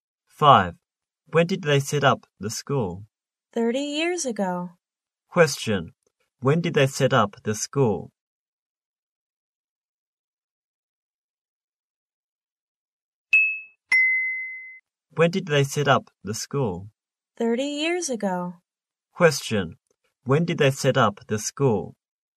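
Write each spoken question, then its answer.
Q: When did they set up the school?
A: 30 years ago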